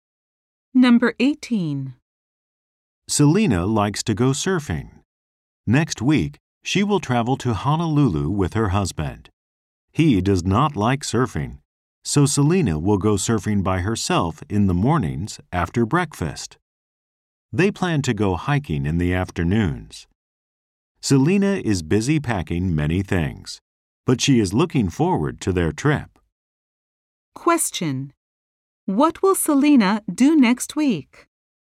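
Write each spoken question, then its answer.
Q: what will Selena do next week?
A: Travel to Honolulu with her husband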